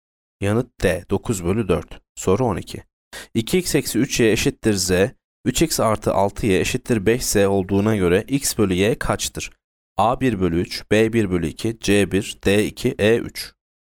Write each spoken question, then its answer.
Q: 2x eksi 3y eşittir z, 3x artı 6y eşittir 5z olduğuna göre x bölü y kaçtır?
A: Yanıt E 3.